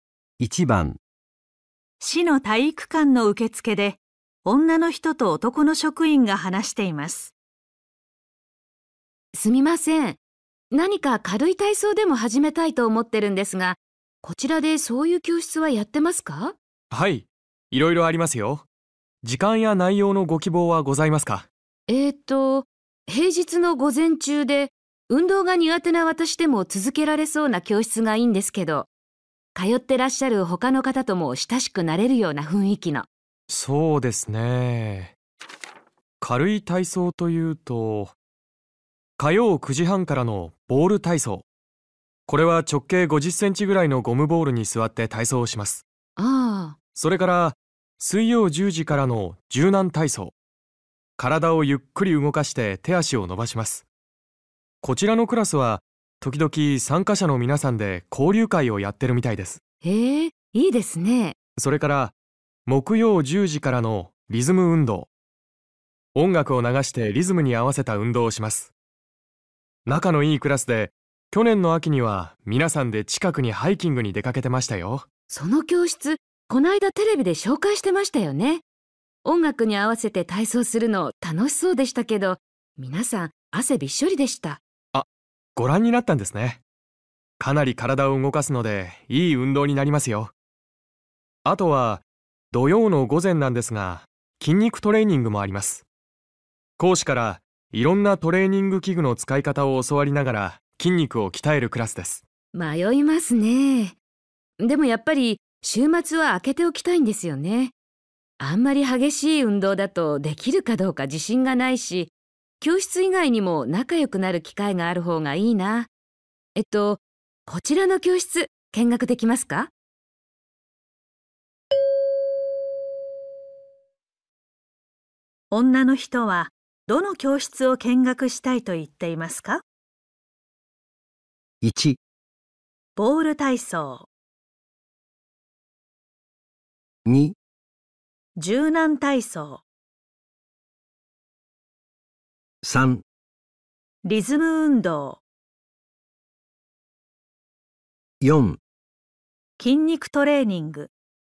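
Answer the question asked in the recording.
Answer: 2: 柔軟体操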